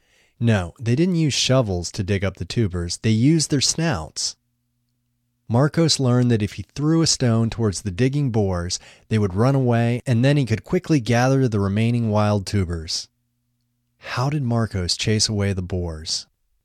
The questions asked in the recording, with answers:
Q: How did Marcos chase away the boars?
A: Marcos threw a stone at the boars to chase them away.